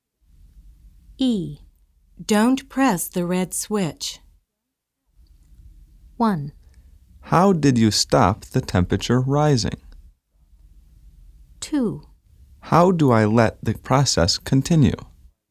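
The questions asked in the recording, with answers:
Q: Don't press the red switch.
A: 2: How do I let the process continue?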